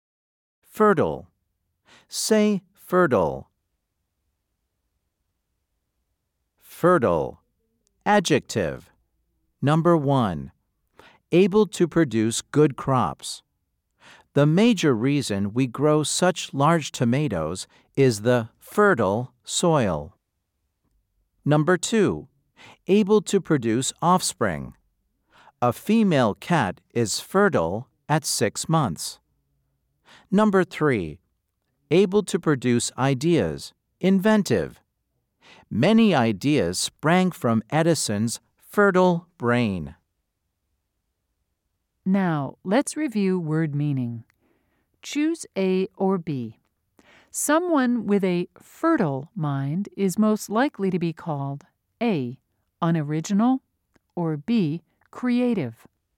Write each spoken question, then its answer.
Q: Choose A or B. Someone with a fertile mind is most likely to be called A, unoriginal, or B, creative.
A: If you said B, you are right.